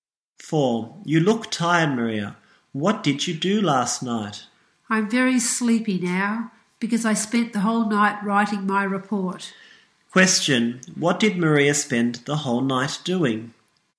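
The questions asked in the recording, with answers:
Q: Question, what did Maria spend the whole night doing?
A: Writing her report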